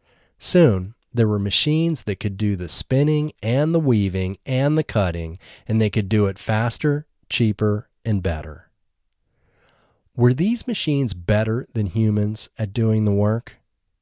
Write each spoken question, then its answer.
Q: Were these machines better than humans at doing the work?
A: Yes, these machines were better than humans at doing the work.